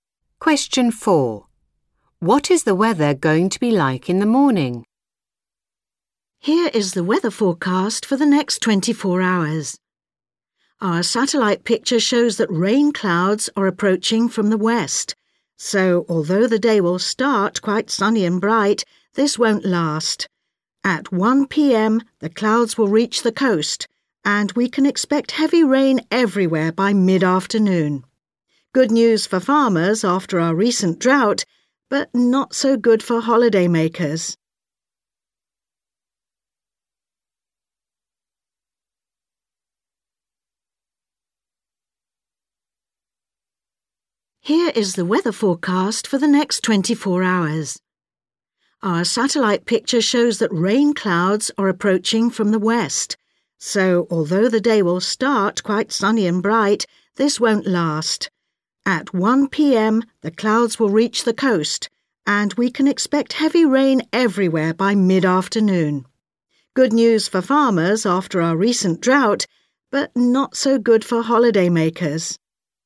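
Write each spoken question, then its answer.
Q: What is the weather going to be like in the morning?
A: Sunny and bright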